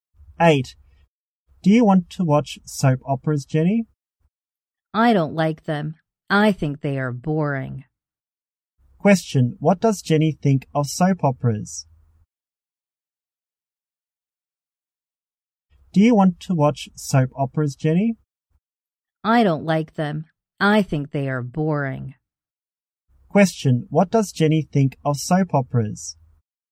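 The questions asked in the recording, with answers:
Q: What does Jenny think of soap operas?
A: Boring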